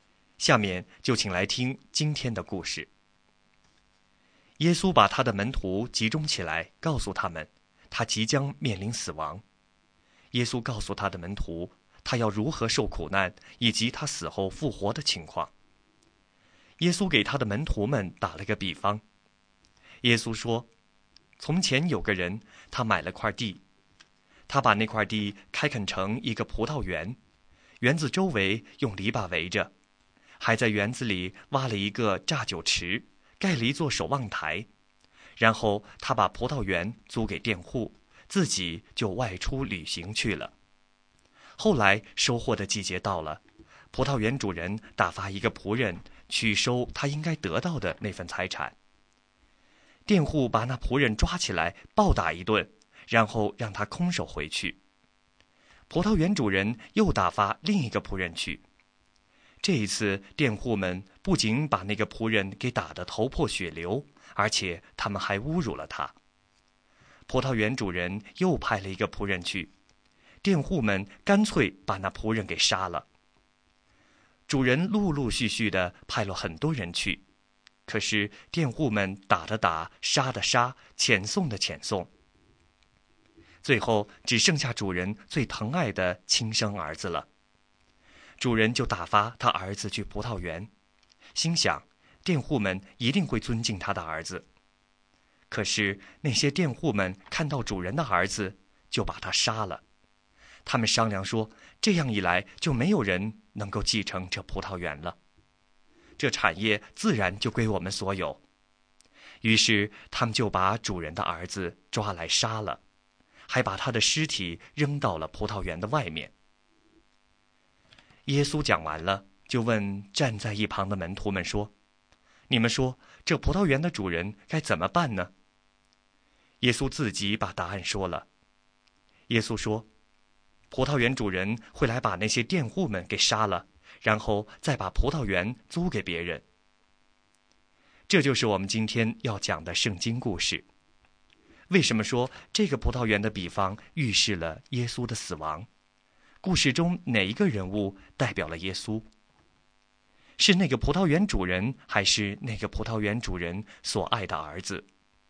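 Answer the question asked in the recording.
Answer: 葡萄园主人所爱的儿子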